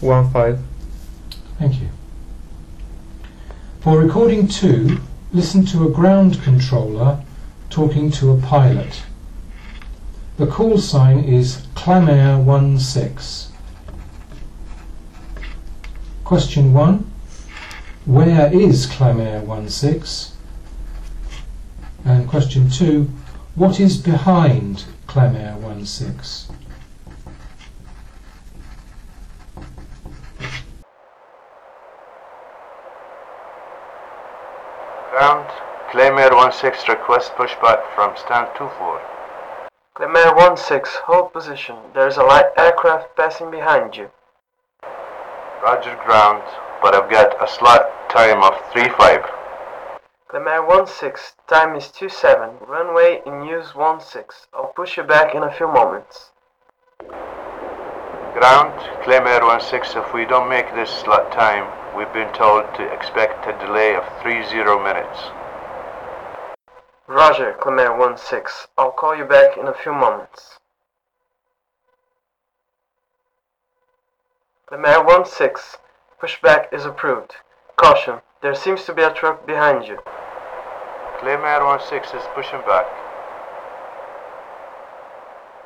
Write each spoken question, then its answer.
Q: Where is Clamair 16?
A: The aircraft is in standard 24,